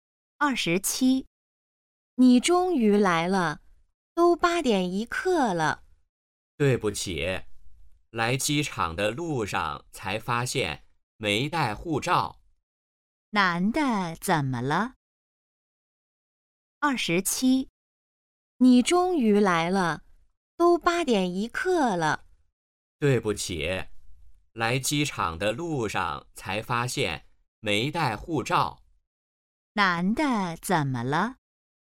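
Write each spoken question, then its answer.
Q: 男的怎么了?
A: 没带护照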